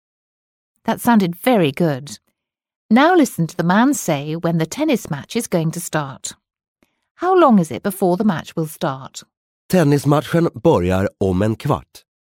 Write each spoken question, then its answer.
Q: How long is it before the match will start?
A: He said that the tennis match will start in a quarter of an hour.